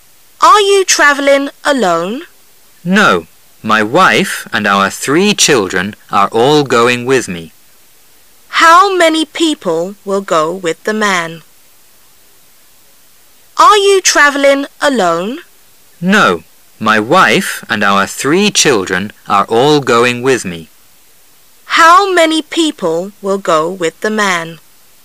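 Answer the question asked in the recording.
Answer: Four (his wife and three children)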